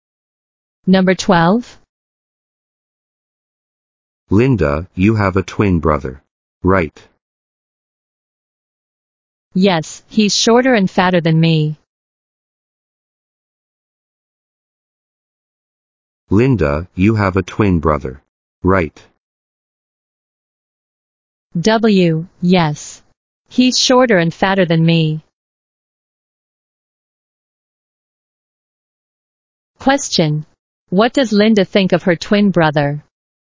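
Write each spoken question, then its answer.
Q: What does Linda think of her twin brother?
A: He is shorter and fatter than her.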